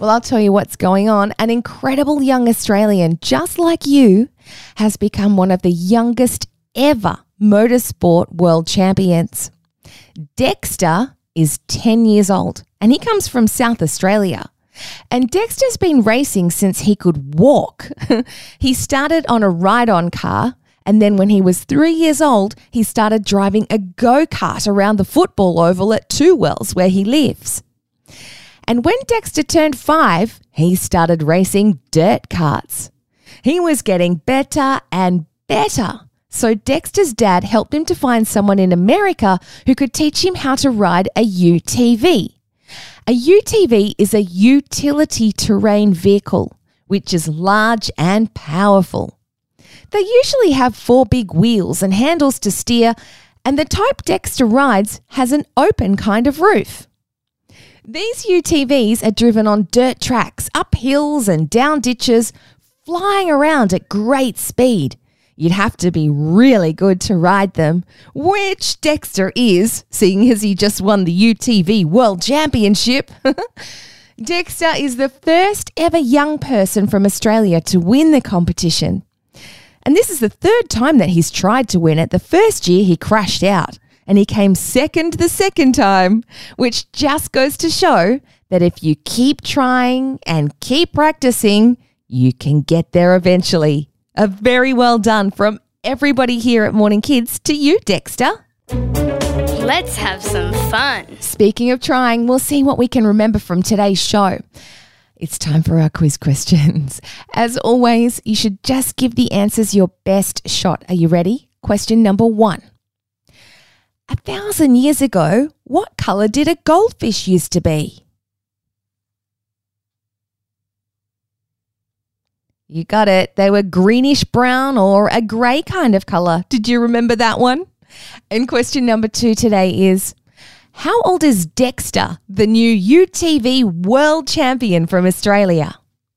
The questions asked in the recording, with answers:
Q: how old is Dexter, the new UTV world champion from Australia?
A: He's 10.